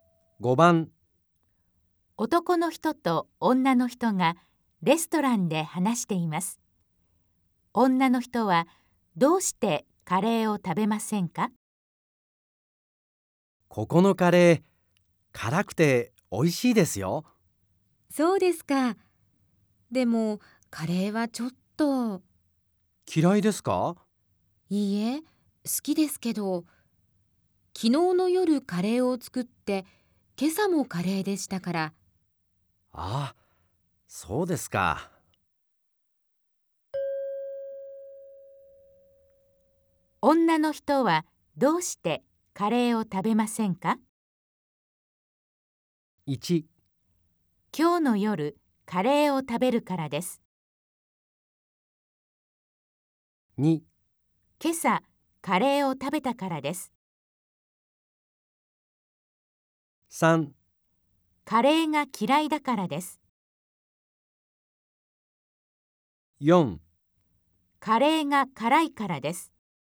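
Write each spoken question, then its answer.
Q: 女の人はどうしてカレーを食べませんか?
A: 2: 今晩カレーを食べるからです。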